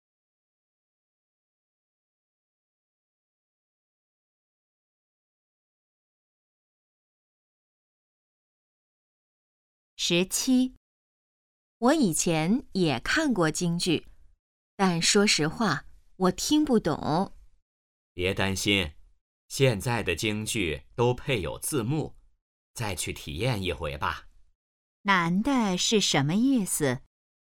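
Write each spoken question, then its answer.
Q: 男的是什么意思?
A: 劝女的再去看一次京剧,现在有字幕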